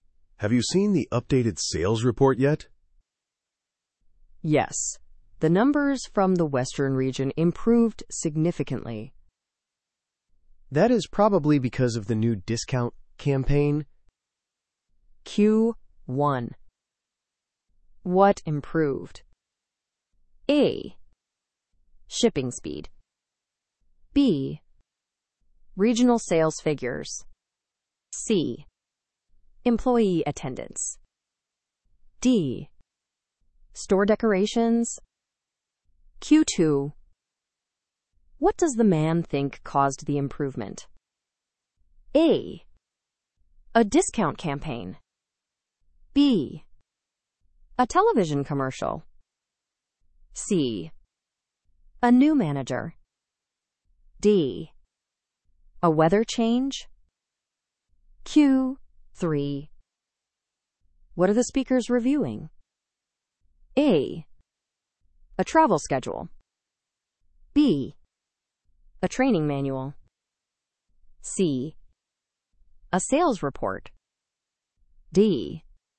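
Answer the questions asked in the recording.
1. B: Regional sales figures.
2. A: A discount campaign.
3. C: A sales report.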